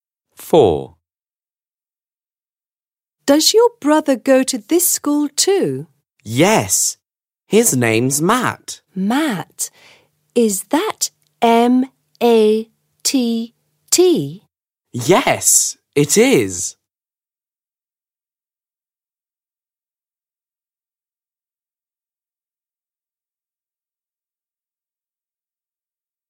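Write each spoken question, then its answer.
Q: Does your brother go to this school too?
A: Yes, his name's Matt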